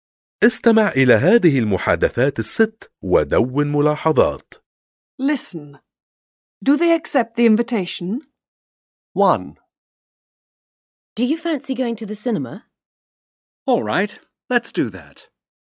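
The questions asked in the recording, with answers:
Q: Do they accept the invitation?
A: Yes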